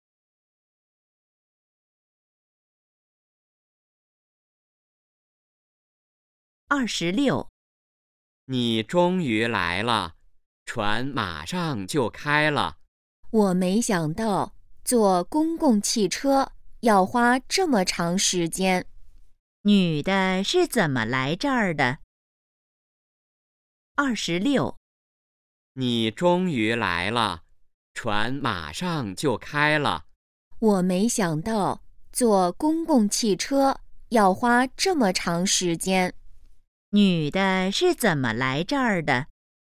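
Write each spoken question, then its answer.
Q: 女的是怎么来这儿的?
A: 坐公共汽车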